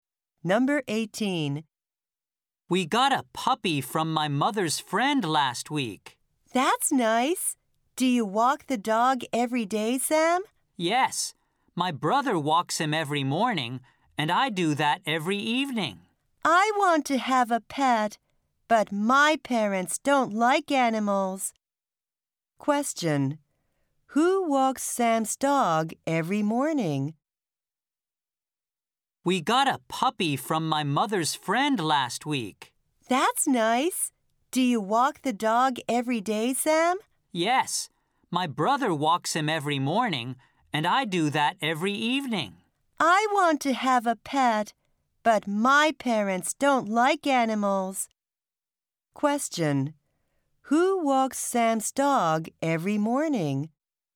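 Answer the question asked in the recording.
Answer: Sam's brother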